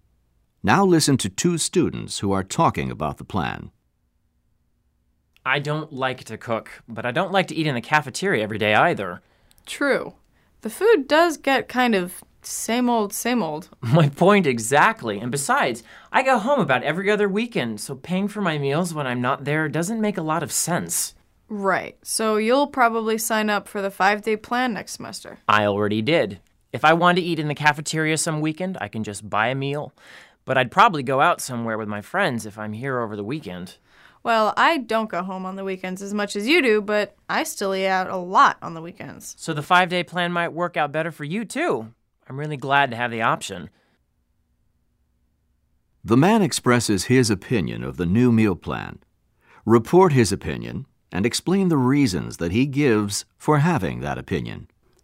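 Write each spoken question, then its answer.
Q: The man expresses his opinion of the new meal plan. Report his opinion and explain the reasons that he gives for having that opinion.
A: He likes the new plan and has already signed up for the 5-day plan. The cafeteria food gets repetitive, and he goes home about every other weekend, so paying for weekend meals makes no sense. He can buy a cafeteria meal or eat out with friends on weekends.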